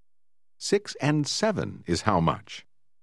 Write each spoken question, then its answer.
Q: 6 and 7 is how much?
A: 13.